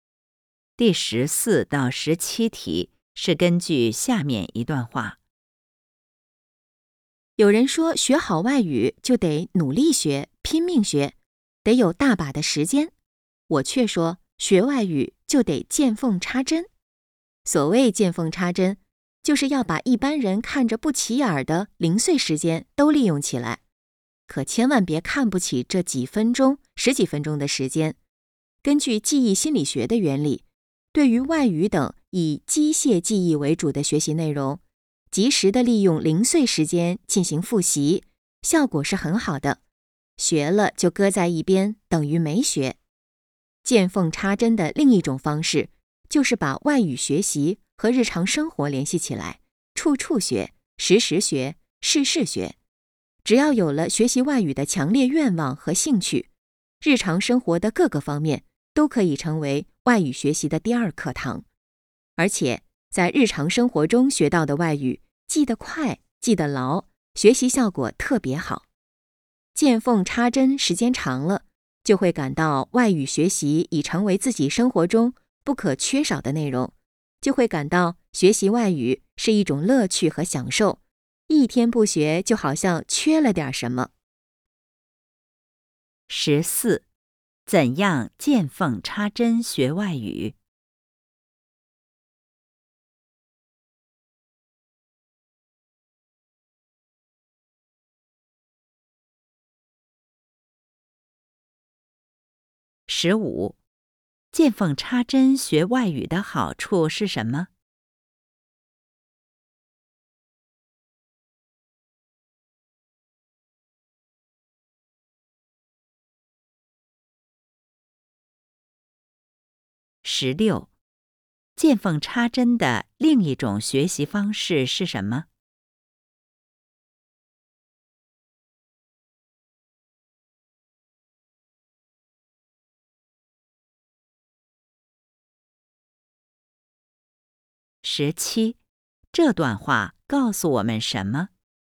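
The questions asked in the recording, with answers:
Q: 怎样见缝插针学外语?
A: 把零碎时间都利用起来

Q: 见缝插针的另一种学习方式是什么?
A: 把外语学习和日常生活联系起来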